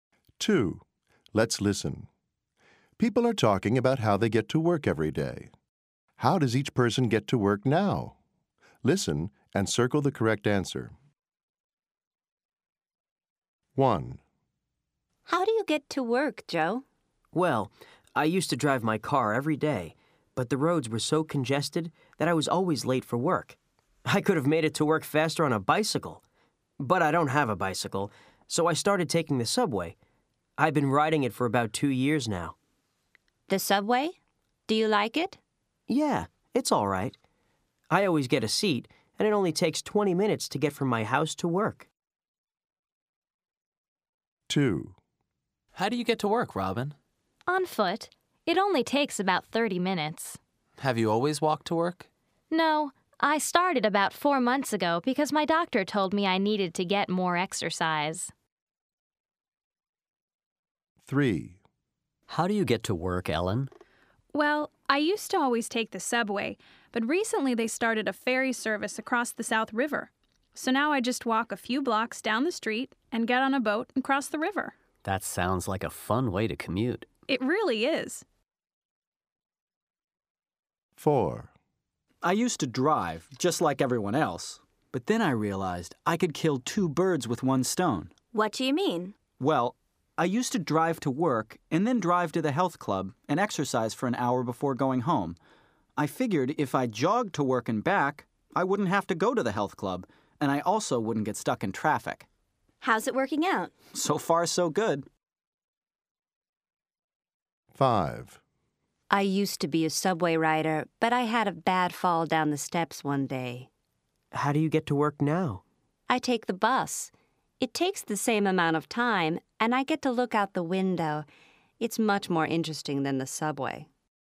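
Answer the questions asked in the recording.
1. By subway
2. On foot
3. By ferry (boat)
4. Jogging
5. By bus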